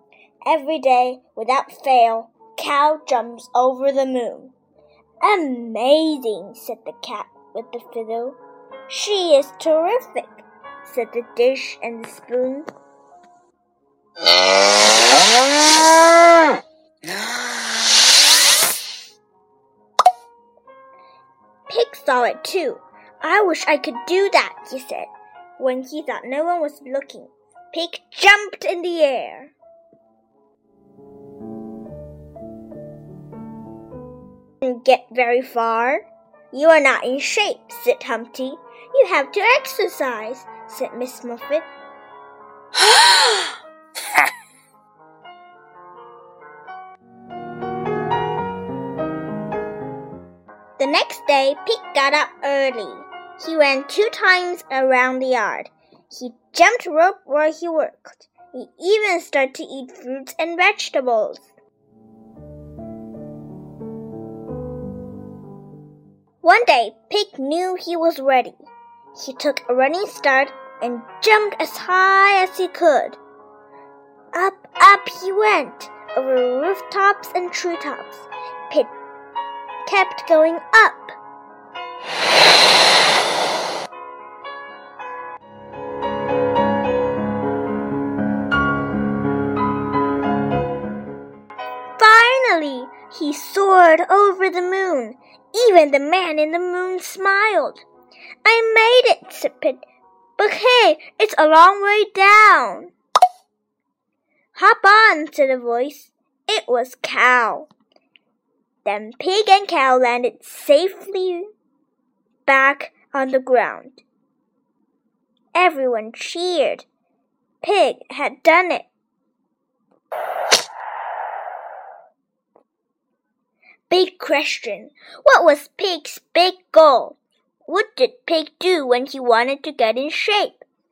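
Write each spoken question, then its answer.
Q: What was Pig's big goal?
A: To jump over the moon

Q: What did Pig do when he wanted to get in shape?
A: He ran around the yard, jumped rope and ate fruits and vegetables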